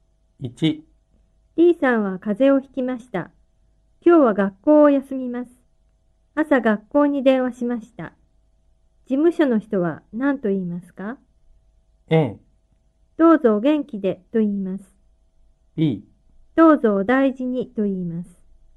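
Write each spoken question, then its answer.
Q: 事務所の人は何と言いますか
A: B: どうぞお大事にと言います。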